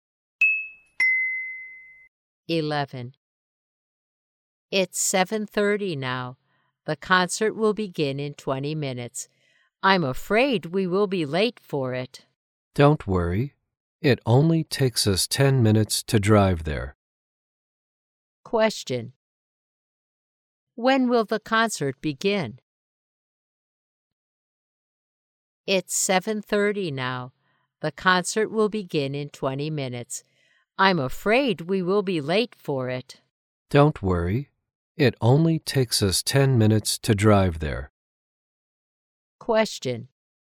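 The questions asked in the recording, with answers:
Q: When will the concert begin?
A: At 7:50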